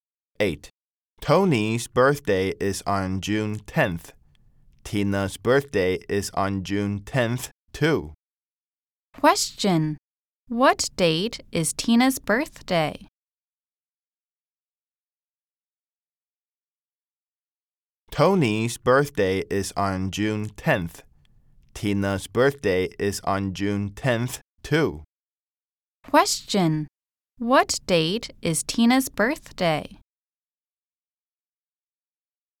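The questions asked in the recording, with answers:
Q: Question. What date is Tina's birthday?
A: June 10th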